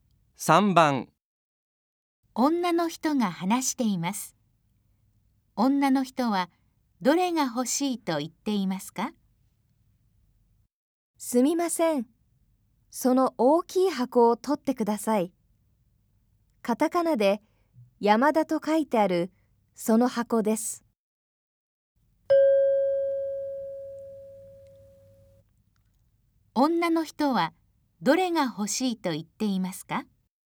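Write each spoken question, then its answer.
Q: 女の人はどれが欲しいと言っていますか?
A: カタカナで山田と書いてある大きい箱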